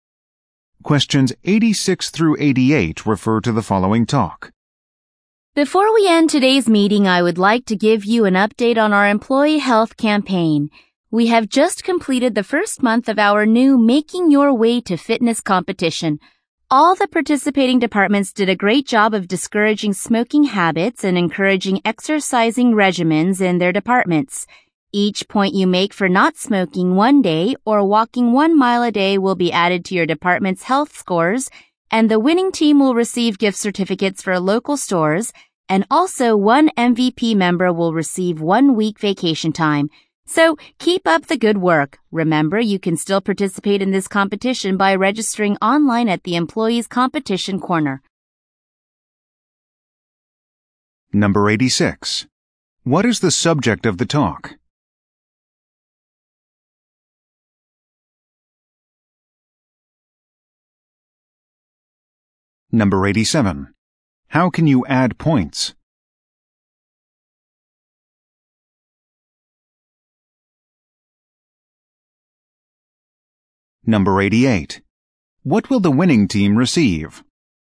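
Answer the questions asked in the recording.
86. The employee health campaign (fitness competition)
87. By not smoking for a day or walking 1 mile a day
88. Gift certificates for local stores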